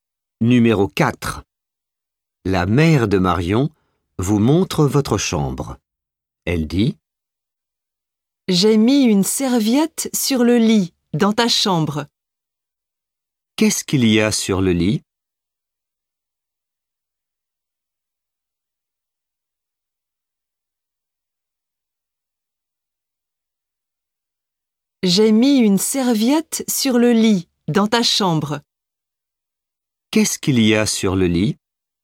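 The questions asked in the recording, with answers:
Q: Qu'est-ce qu'il y a sur le lit ?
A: Une serviette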